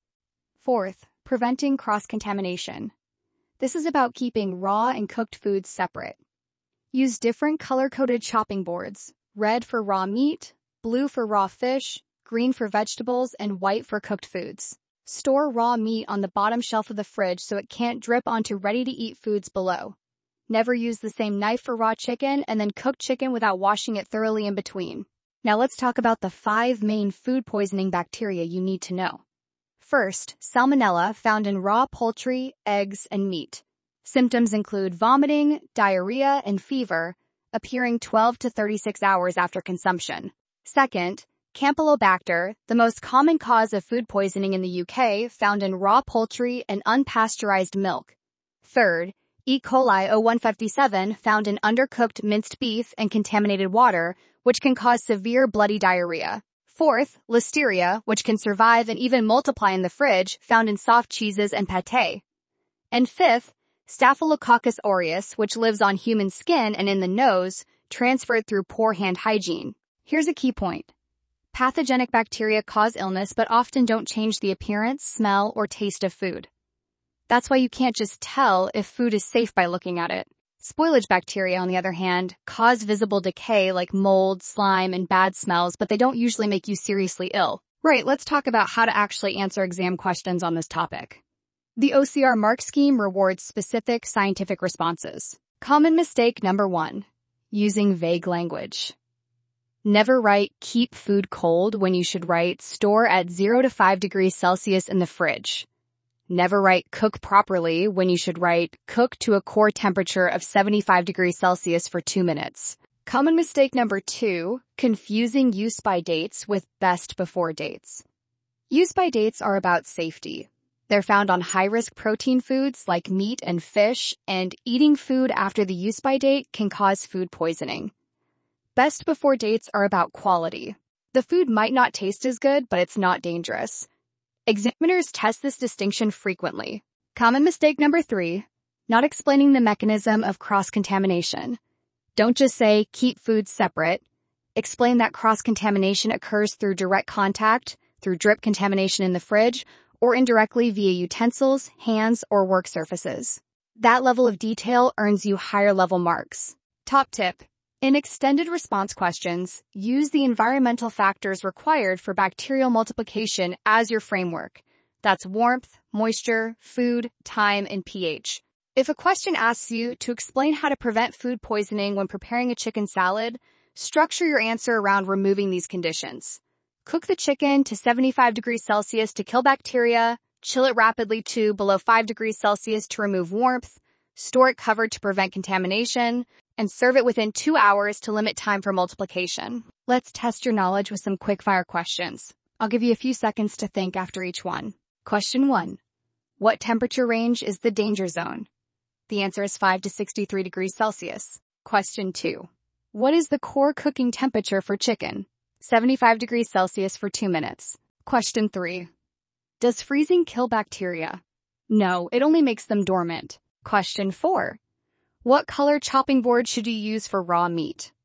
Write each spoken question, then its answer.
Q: what color chopping board should you use for raw meat?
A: Red.